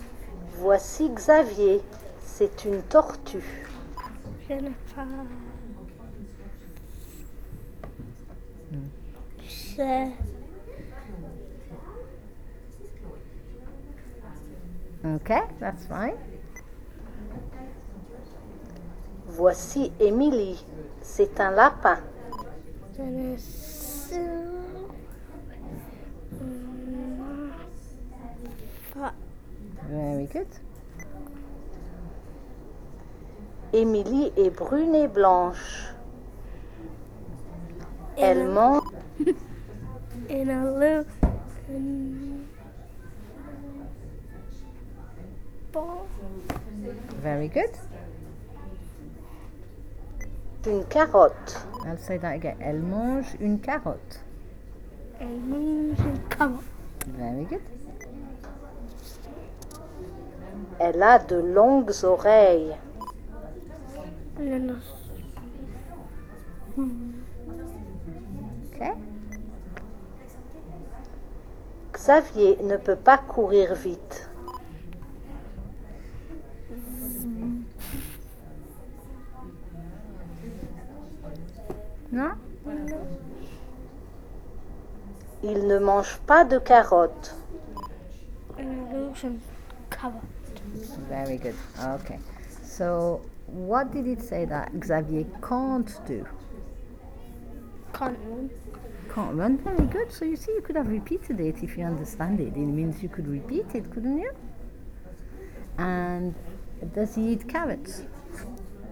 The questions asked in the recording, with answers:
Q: And does he eat carrots?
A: No, very good.